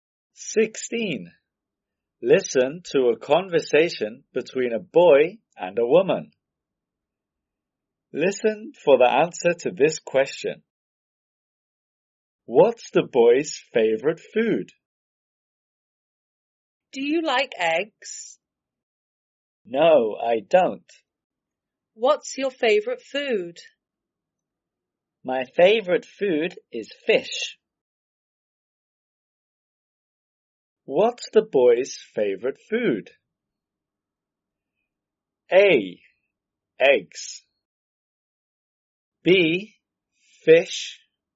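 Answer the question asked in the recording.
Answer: B: Fish.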